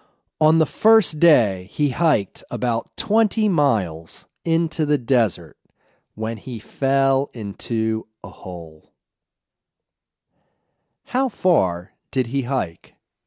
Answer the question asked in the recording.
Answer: He hiked about 20 miles.